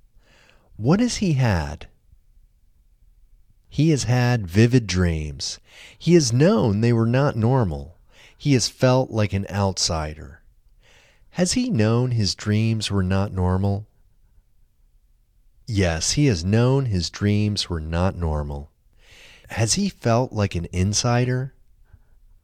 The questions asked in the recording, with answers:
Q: Has he felt like an insider?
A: No, he hasn't felt like an insider.